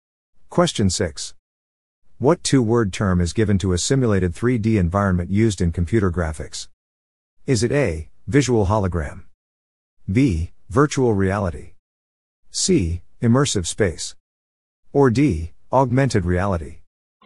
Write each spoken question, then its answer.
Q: What two word term is given to a simulated 3D environment used in computer graphics?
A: The answer is B. Virtual reality.